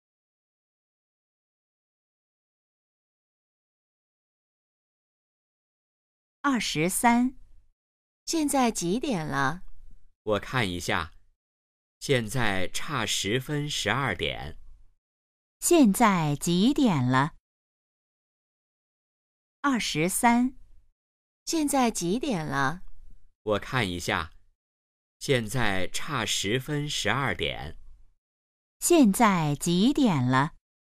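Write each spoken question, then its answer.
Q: 现在几点了?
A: 十一点五十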